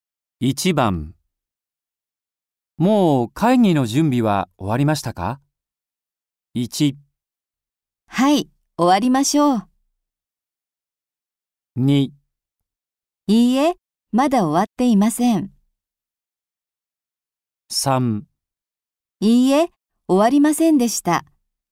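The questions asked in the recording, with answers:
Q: もう会議の準備は終わりましたか?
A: 2: いいえ、まだ終わっていません。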